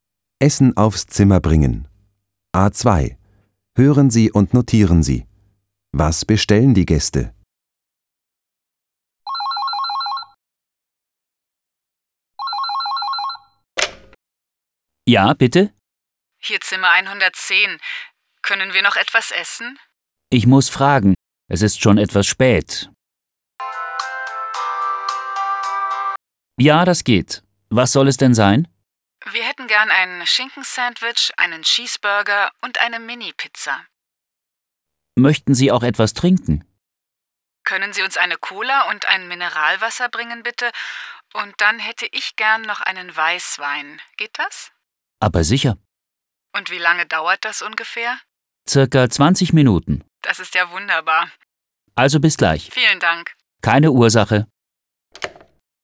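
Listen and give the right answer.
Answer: Ein Schinkensandwich, einen Cheeseburger, eine Mini-Pizza, eine Cola, ein Mineralwasser und einen Weißwein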